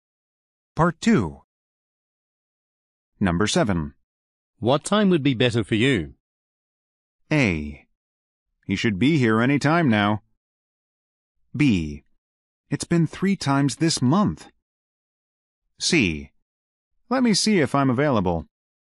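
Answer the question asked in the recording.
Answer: C: Let me see if I'm available.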